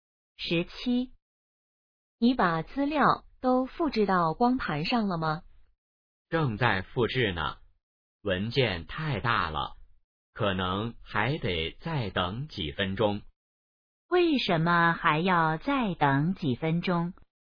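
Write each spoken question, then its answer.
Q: 为什么还要再等几分钟?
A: 文件太大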